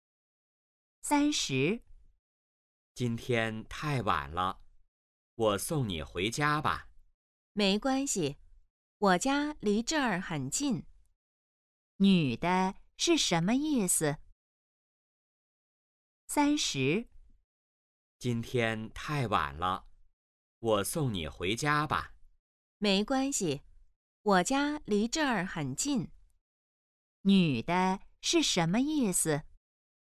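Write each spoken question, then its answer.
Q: 女的是什么意思?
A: 不用送她,她家很近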